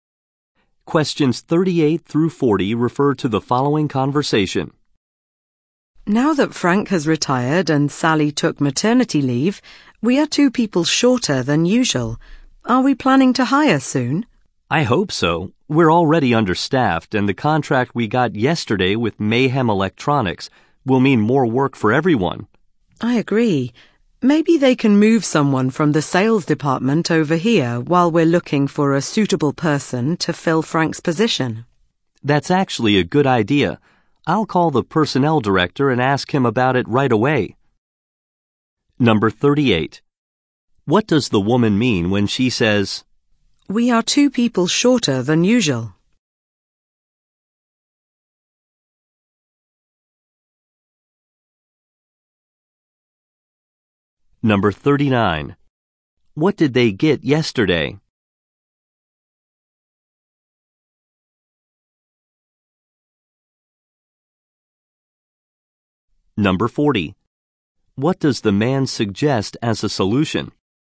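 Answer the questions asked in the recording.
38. They are understaffed.
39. A contract with Mayhem Electronics.
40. Moving someone from the sales department temporarily.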